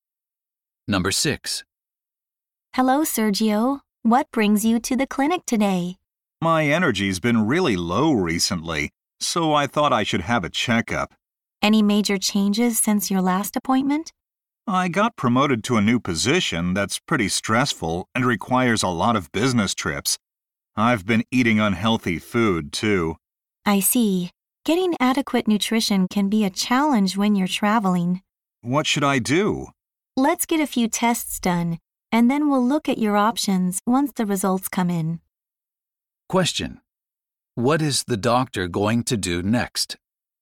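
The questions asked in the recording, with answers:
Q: What is the doctor going to do next?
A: Run some tests on Sergio.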